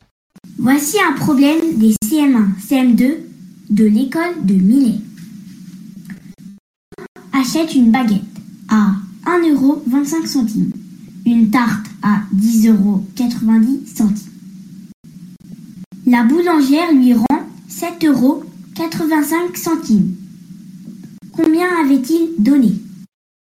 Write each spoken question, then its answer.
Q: Combien avait-il donné ?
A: La bonne réponse était 20 euros.